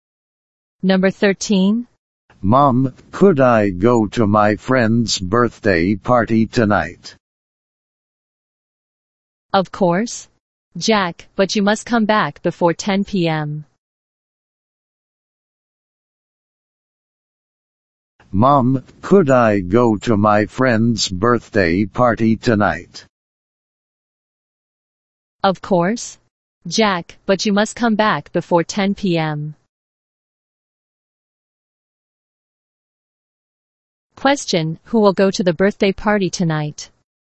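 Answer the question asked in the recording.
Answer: Jack.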